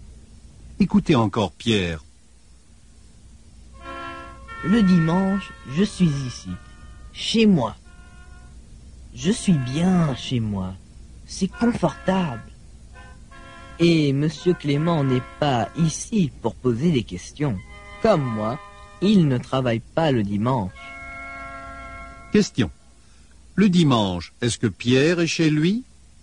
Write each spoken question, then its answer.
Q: Le dimanche, est-ce que Pierre est chez lui?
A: Oui, le dimanche, Pierre est chez lui.